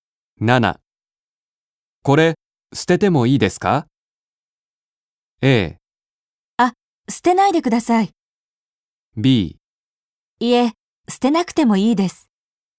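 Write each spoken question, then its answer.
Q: これ、捨ててもいいですか?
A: A: あ、捨てないでください。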